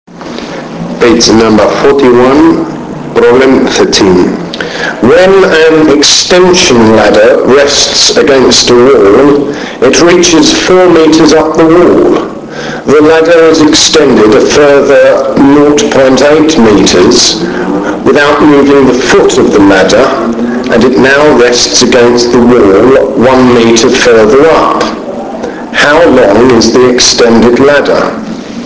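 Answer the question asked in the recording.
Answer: 6.025 meters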